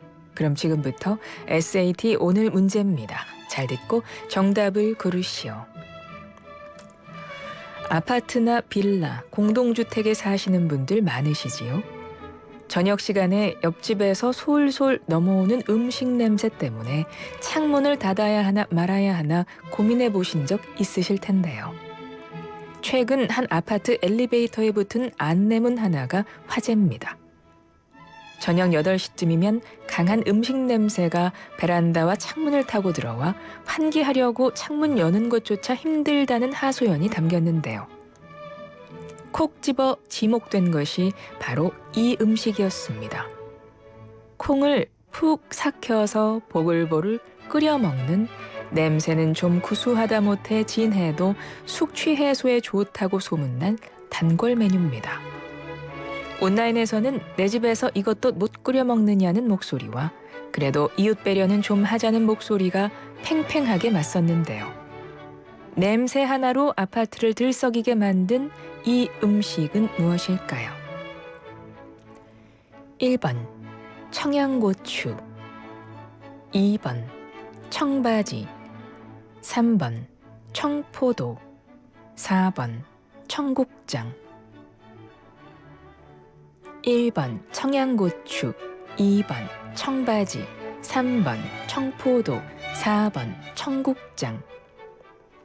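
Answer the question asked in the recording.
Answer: 4: 청국장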